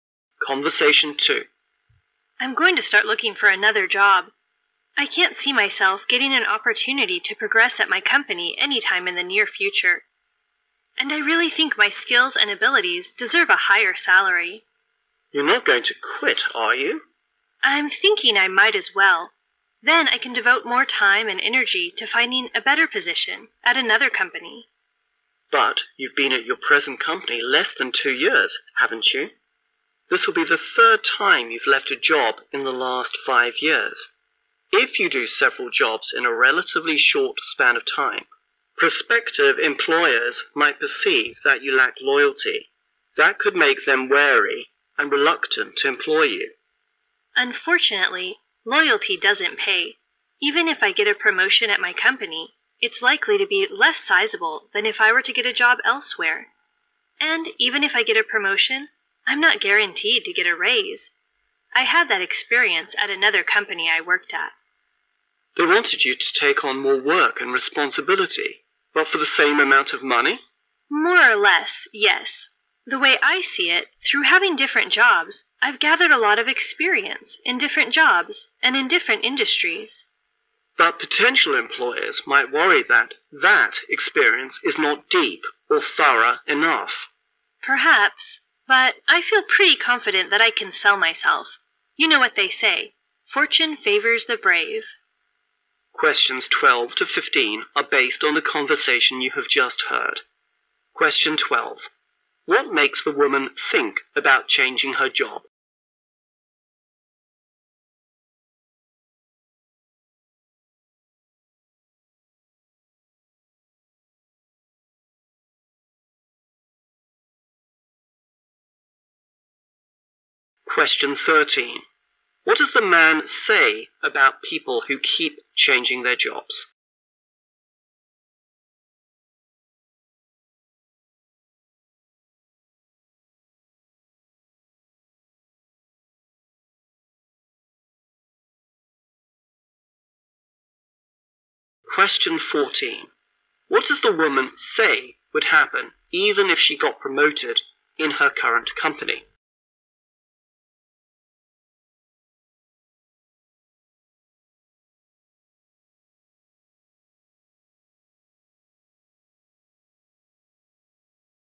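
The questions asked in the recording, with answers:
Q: What makes the woman think about changing her job?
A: No chance of progress soon; she deserves a higher salary

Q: What does the man say about people who keep changing their jobs?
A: Employers might think they lack loyalty

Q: What does the woman say would happen even if she got promoted in her current company?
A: She wouldn't be guaranteed a raise

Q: What benefit has the woman gained from changing her jobs frequently?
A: Experience in different jobs and industries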